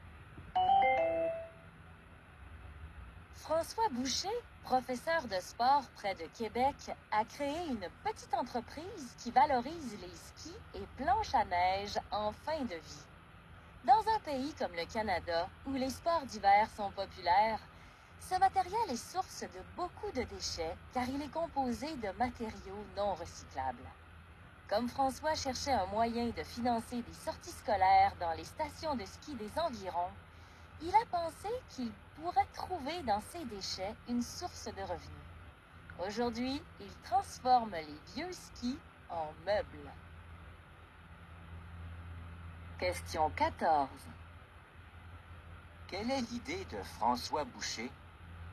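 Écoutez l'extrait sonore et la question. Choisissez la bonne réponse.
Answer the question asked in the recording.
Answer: Transformer les vieux skis en meubles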